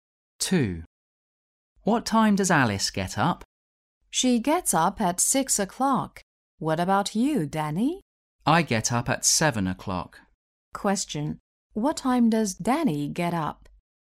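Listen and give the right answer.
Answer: 7 o'clock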